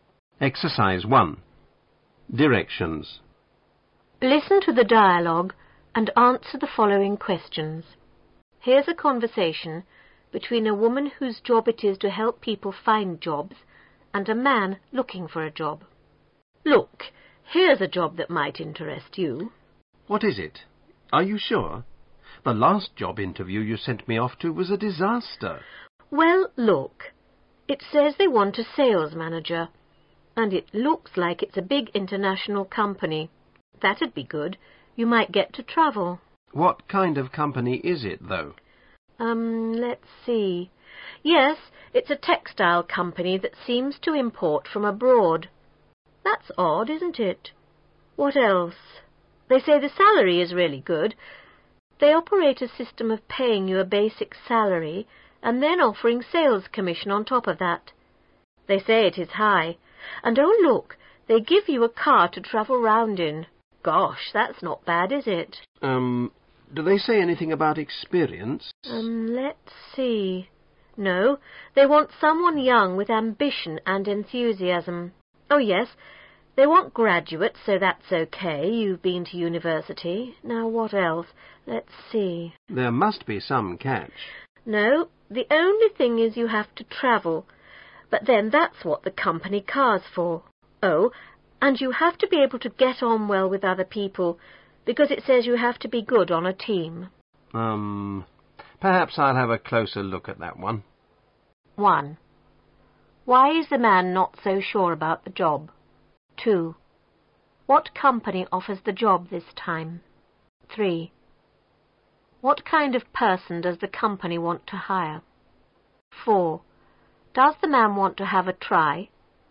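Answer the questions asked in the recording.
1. The last job interview she sent him to was a disaster
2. A big international textile company
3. Someone young, ambitious, enthusiastic, a graduate, good on a team
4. Yes; he says he'll have a closer look at it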